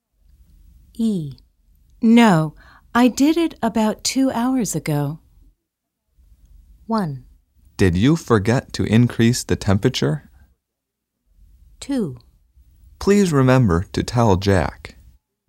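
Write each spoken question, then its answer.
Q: No, I did it about 2 hours ago.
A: 1: Did you forget to increase the temperature?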